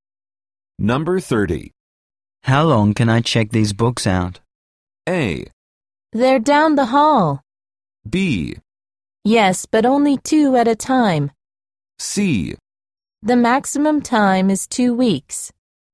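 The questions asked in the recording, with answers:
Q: How long can I check these books out?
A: C: The maximum time is 2 weeks.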